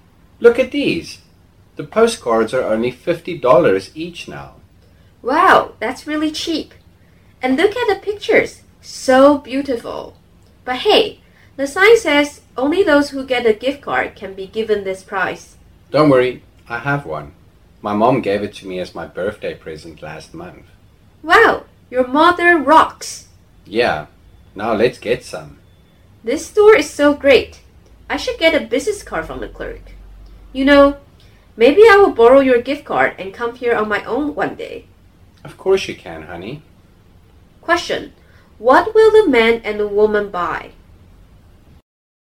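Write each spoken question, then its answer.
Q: what will the man and the woman buy?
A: Postcards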